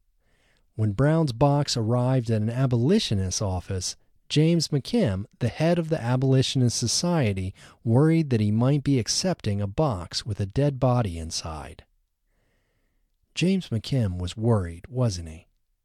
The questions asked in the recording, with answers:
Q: James McKim was worried, wasn't he?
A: Yes, James McKim was worried.